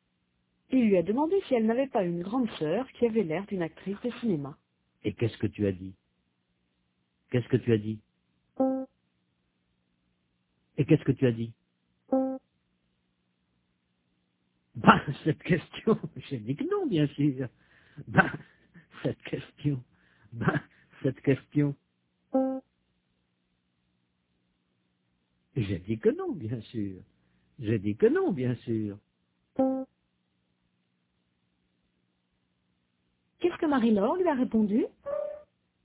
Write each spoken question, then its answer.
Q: Qu'est-ce que Marie-Laure lui a répondu?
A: Elle a dit que non.